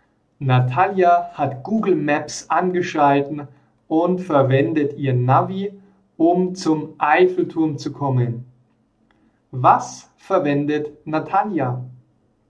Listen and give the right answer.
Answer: Google Maps. Sie verwendet Google Maps als Navi.